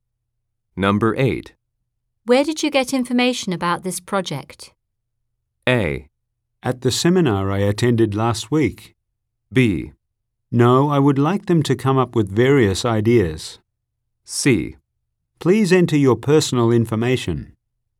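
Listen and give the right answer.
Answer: A: At the seminar I attended last week.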